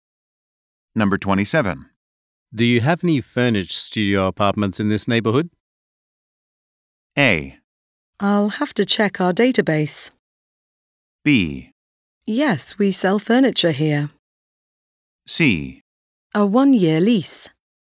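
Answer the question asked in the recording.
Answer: A: I'll have to check our database.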